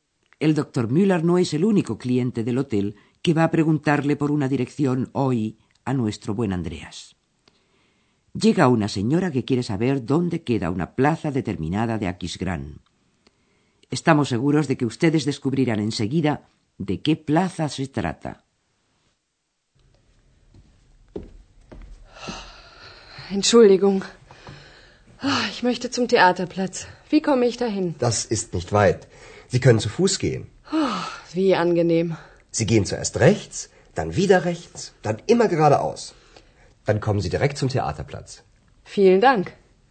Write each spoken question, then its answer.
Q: Estamos seguros de que ustedes descubrirán enseguida de qué plaza se trata.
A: plaza que busca la señora es la plaza del teatro.